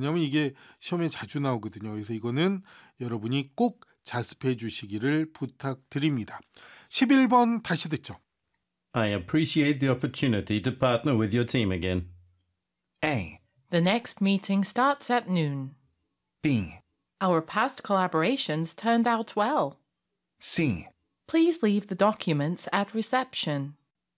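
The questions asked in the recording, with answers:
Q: I appreciate the opportunity to partner with your team again.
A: B: Our past collaborations turned out well.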